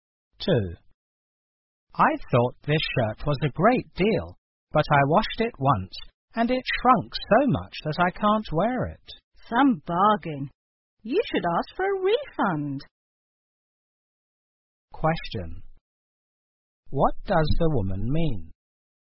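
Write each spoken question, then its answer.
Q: What does the woman mean?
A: The shirt was not a real bargain, and the man should ask for a refund.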